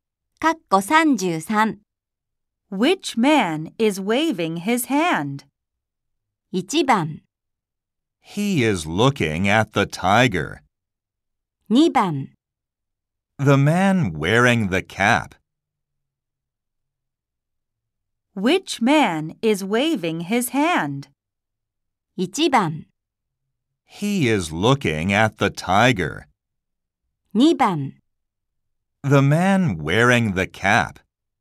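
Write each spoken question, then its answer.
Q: Which man is waving his hand?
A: 2: The man wearing the cap.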